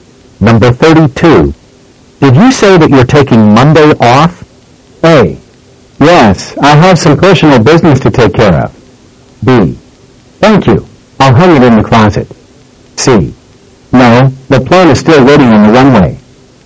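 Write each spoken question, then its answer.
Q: Did you say that you're taking Monday off?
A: A: Yes, I have some personal business to take care of.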